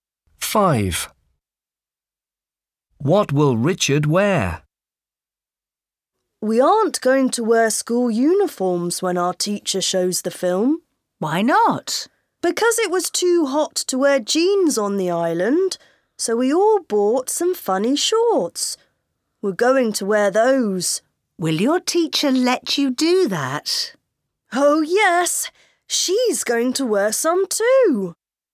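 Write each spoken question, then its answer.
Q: What will Richard wear?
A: Some funny shorts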